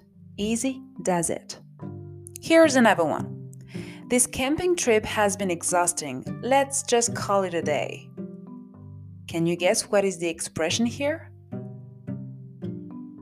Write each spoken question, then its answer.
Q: Can you guess what is the expression here?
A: Call it a day here is the expression to remember.